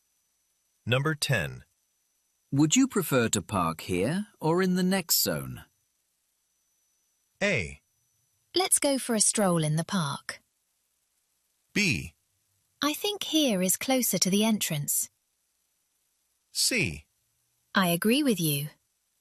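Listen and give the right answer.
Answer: B: I think here is closer to the entrance.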